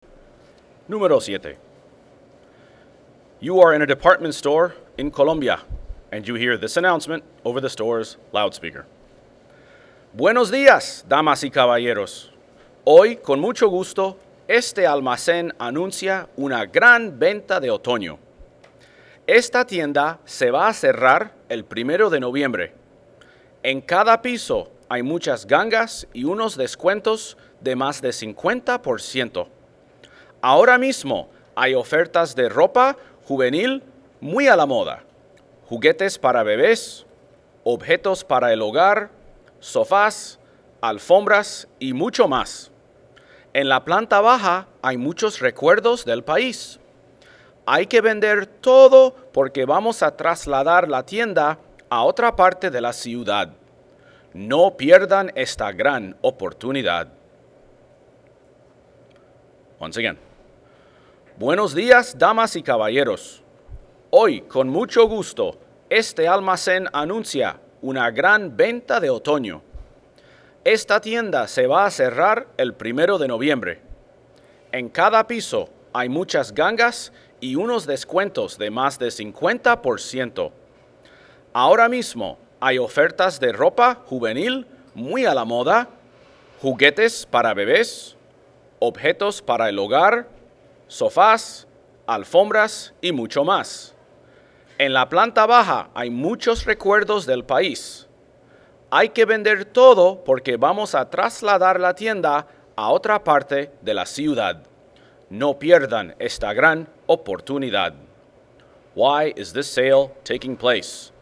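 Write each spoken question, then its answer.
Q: Why is this sale taking place?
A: The store is moving to another part of the city.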